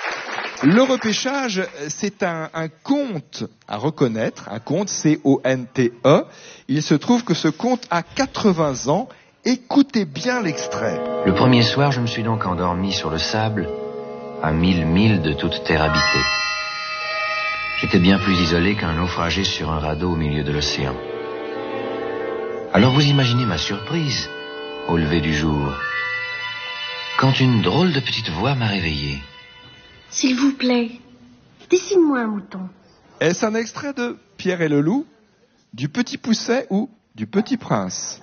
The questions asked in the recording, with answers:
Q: Est-ce un extrait de Pierre et le Loup, du Petit Poucet ou du Petit Prince ?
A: Oui, c'est un extrait du Petit Prince de Saint-Exupéry, avec la voix de Gérard Philippe.